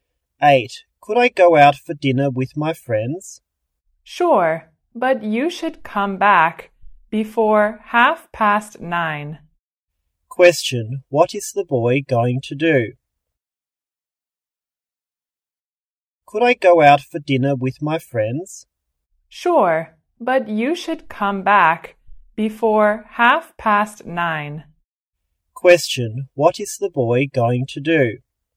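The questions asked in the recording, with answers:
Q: What is the boy going to do?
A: Go out for dinner with his friends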